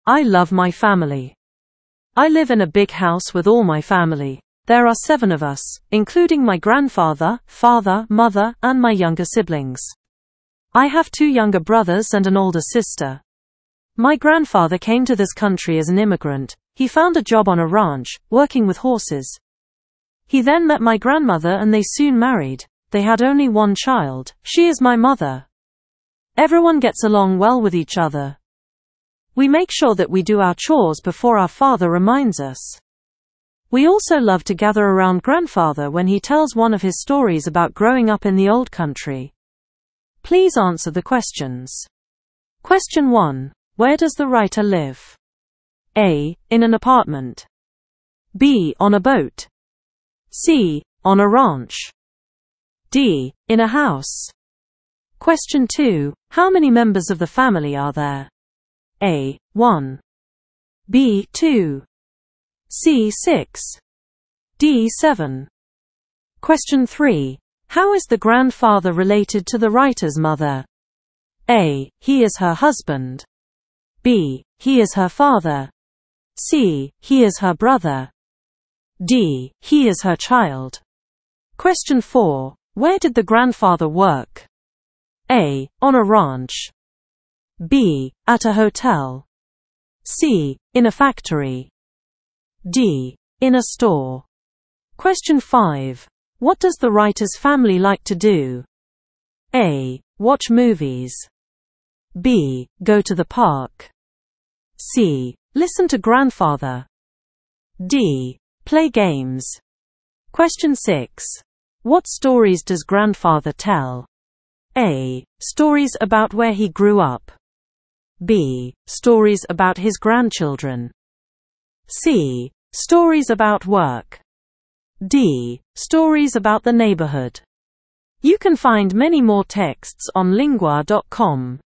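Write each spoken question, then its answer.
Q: Where does the writer live?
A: D: In a house.

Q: How many members of the family are there?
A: D: 7.

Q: How is the grandfather related to the writer's mother?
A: B: He is her father.

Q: Where did the grandfather work?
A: A: On a ranch.

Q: What does the writer's family like to do?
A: C: Listen to grandfather.

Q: What stories does grandfather tell?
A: A: Stories about where he grew up.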